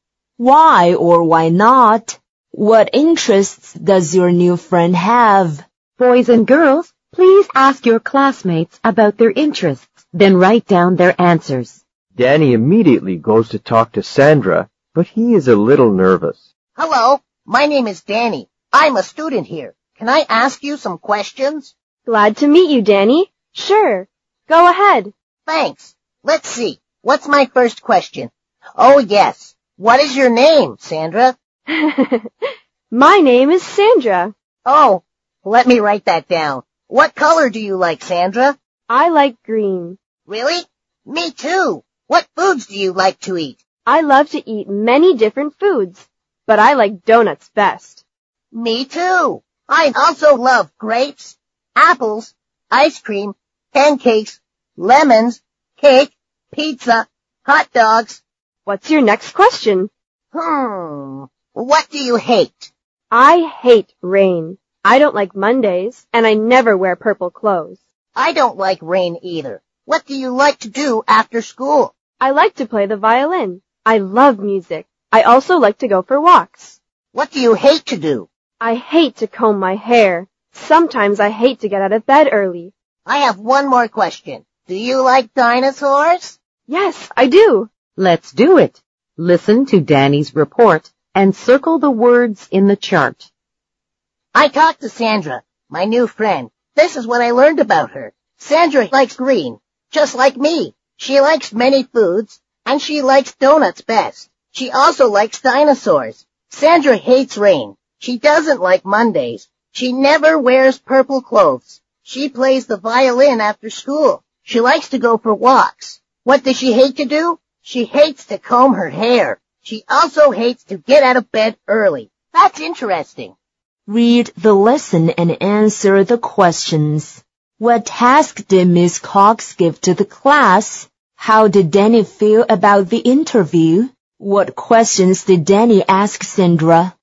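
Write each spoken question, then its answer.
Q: How did Danny feel about the interview?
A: A little nervous

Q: What questions did Danny ask Sandra?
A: Her name, what color she likes, what foods she likes, what she hates, what she likes to do after school, what she hates to do, and whether she likes dinosaurs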